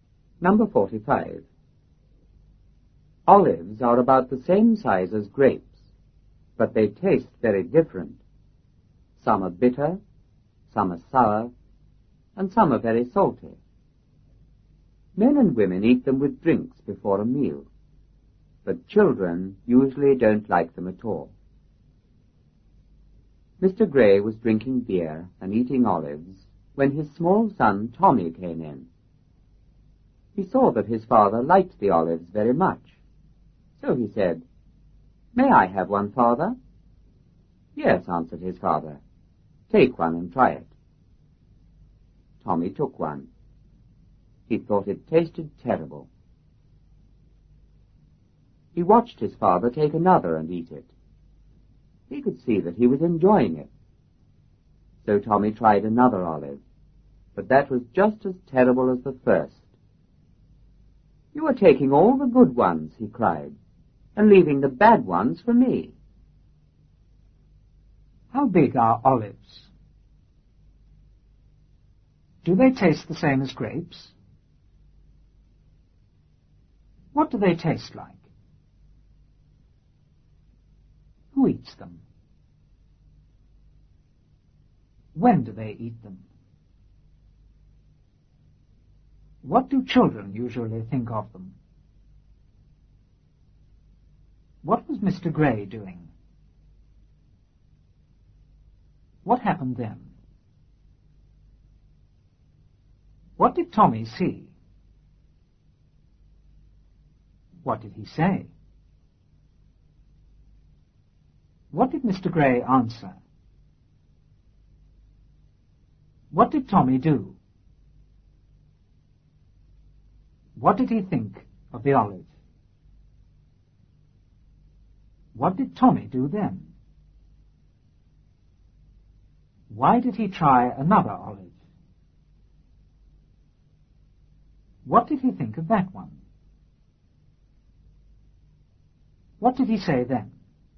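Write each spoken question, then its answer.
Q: How big are olives?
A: About the same size as grapes

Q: Do they taste the same as grapes?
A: No, they taste very different

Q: What do they taste like?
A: Some are bitter, some sour, some very salty

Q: Who eats them?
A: Men and women

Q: When do they eat them?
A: With drinks before a meal

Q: What do children usually think of them?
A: They don't like them at all

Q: What was Mr. Gray doing?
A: Drinking beer and eating olives

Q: What happened then?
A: His small son Tommy came in

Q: What did Tommy see?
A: That his father liked the olives very much

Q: What did he say?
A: May I have one, Father?

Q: What did Mr. Gray answer?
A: Yes, take one and try it

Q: What did Tommy do?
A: He took one

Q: What did he think of the olive?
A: It tasted terrible

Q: Why did he try another olive?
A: He saw his father enjoying another one

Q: What did he think of that one?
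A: It was just as terrible as the first

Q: What did he say then?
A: You are taking all the good ones and leaving the bad ones for me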